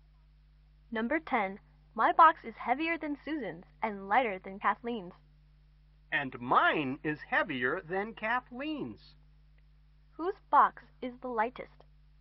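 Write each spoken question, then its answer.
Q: Whose box is the lightest?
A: Susan's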